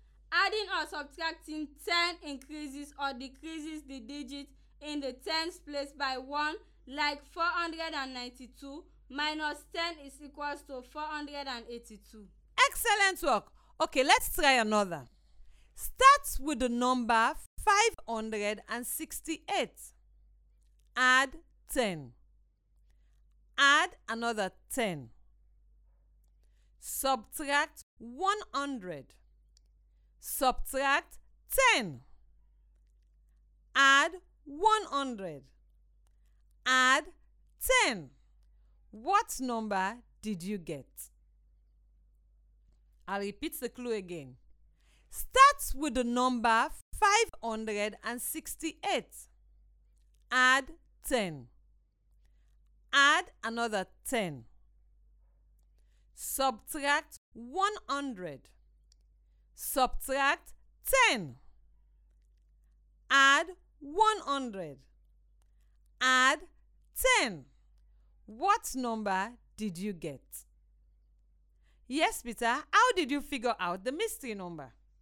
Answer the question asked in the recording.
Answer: And adding 10 makes 588.